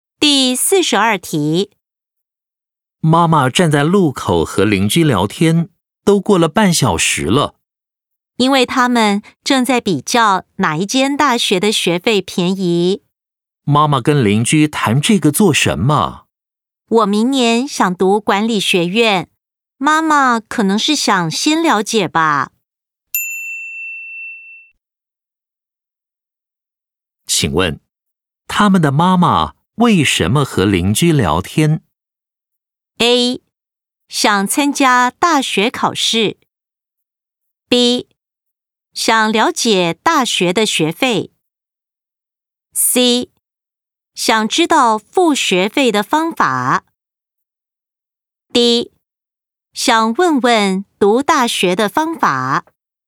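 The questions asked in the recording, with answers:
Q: 请问,他们的妈妈为什么和邻居聊天?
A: B: 想了解大学的学费。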